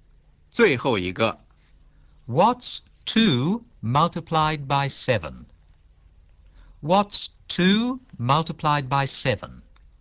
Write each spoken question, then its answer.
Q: What's 2 multiplied by 7?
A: 14.